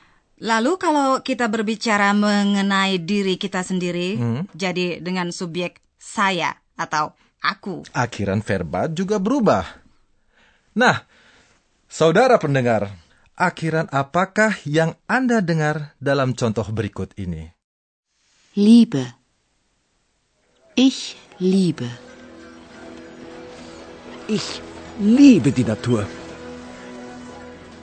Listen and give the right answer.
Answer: Jadi Eh, saya hmm. atau aku selalu berpasangan dengan akhiran e.